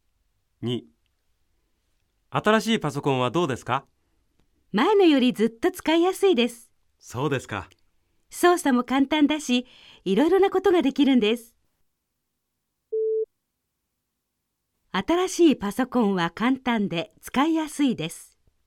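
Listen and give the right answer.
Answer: ○(正しい)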